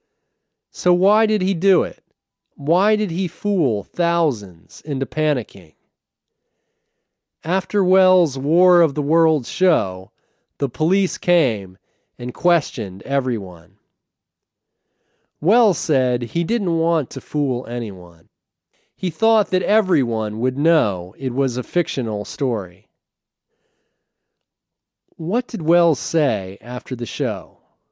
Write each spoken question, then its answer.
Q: What did Welles say after the show?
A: He said he didn't want to fool anyone.